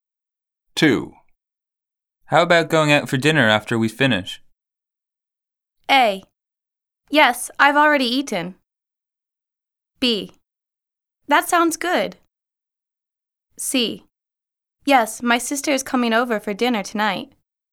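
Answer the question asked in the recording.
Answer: B: That sounds good.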